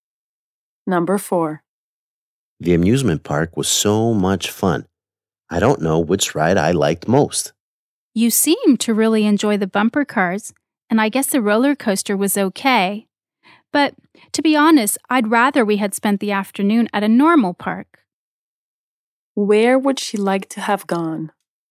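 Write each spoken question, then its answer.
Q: Where would she like to have gone?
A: A normal park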